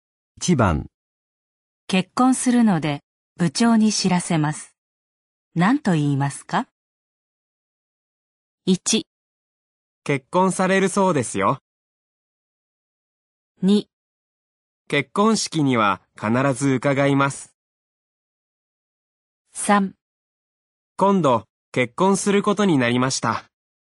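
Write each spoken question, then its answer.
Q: 結婚するので部長に知らせます。何と言いますか?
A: 3: 今度結婚することになりました。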